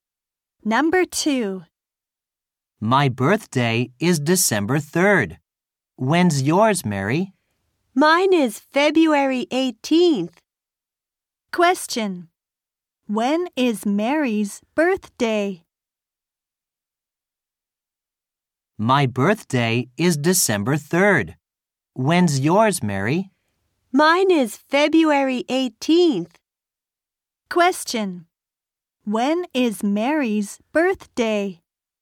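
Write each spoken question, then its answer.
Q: When is Mary's birthday?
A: February 18th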